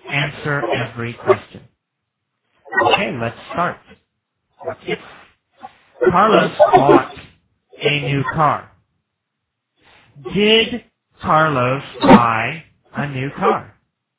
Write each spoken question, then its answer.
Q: Did Carlos buy a new car?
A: Yes. Yes, of course. He bought a new car.